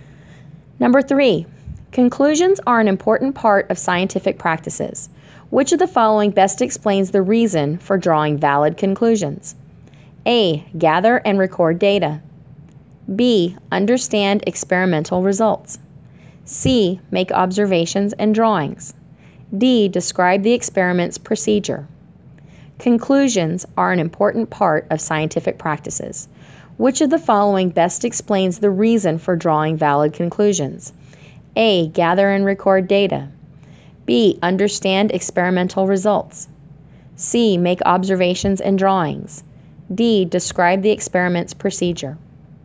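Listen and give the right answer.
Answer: B: Understand experimental results.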